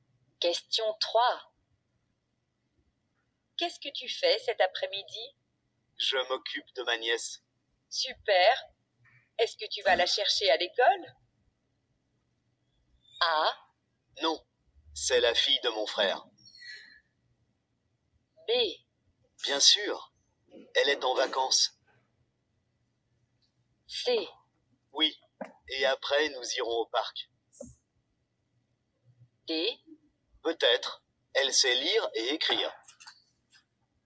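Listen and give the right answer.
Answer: C: Oui, et après nous irons au parc.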